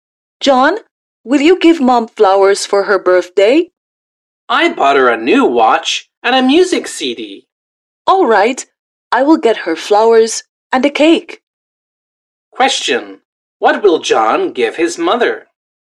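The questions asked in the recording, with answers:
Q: Question, what will John give his mother?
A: A new watch and a music CD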